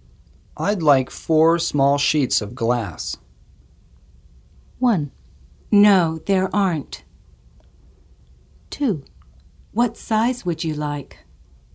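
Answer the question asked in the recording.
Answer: 2: What size would you like?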